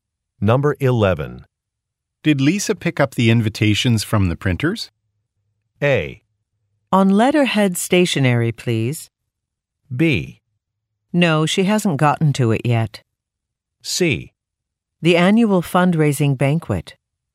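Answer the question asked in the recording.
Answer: B: No, she hasn't gotten to it yet.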